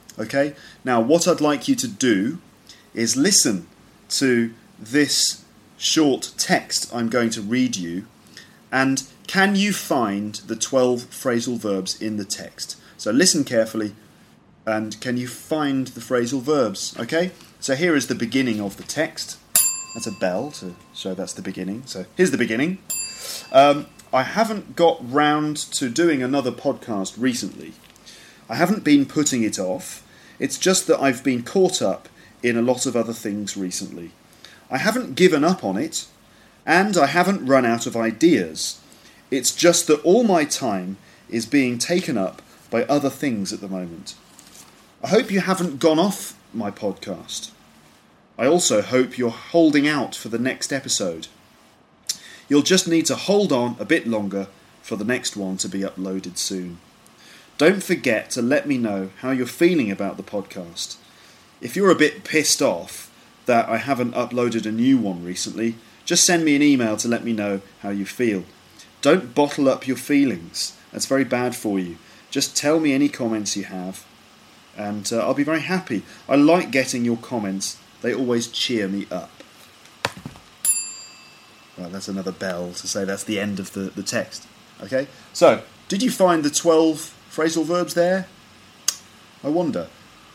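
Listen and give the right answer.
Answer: get round to, put off, be caught up in, give up on, run out of, take up, go off, hold out for, hold on, be pissed off, bottle up, cheer up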